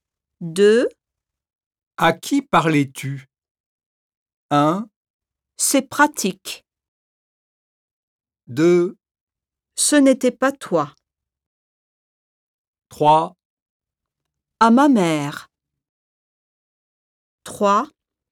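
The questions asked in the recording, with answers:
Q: À qui parlais-tu?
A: 3: À ma mère.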